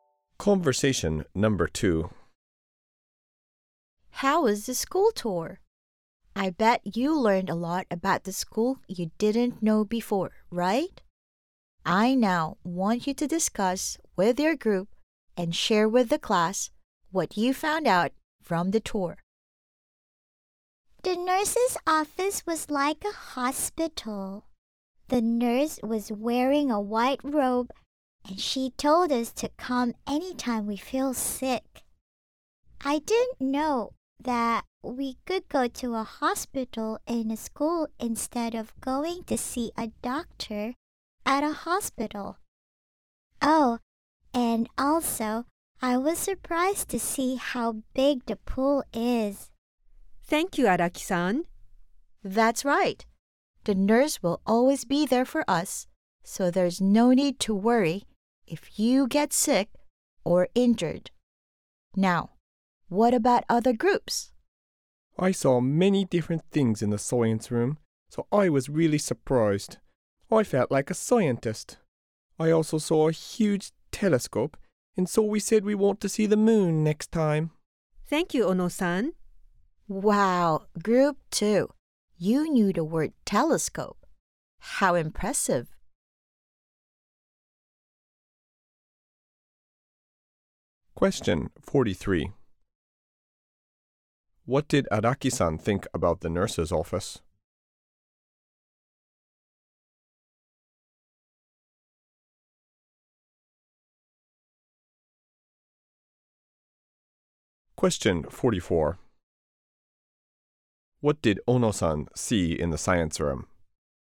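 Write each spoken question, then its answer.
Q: What did Araki-san think about the nurse's office?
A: It was like a hospital.

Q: What did Ono-san see in the science room?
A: A huge telescope.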